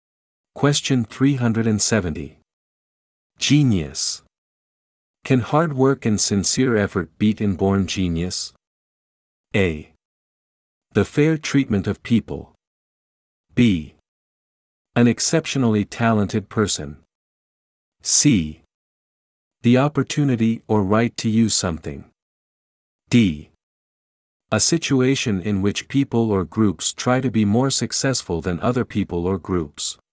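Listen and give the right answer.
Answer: B: An exceptionally talented person.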